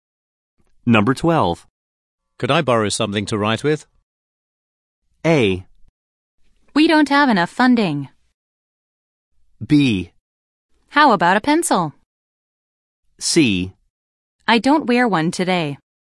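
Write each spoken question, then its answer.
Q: Could I borrow something to write with?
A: B: How about a pencil?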